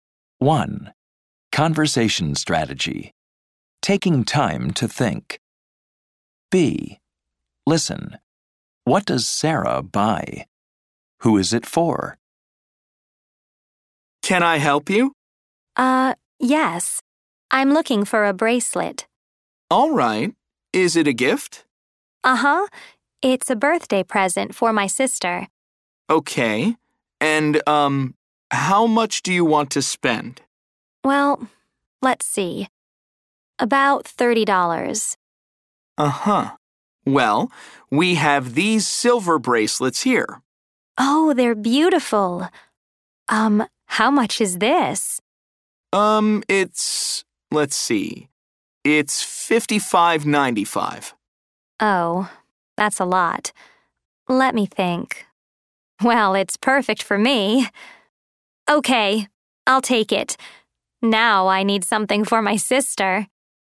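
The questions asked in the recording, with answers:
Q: What does Sarah buy?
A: A silver bracelet

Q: Who is it for?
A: Herself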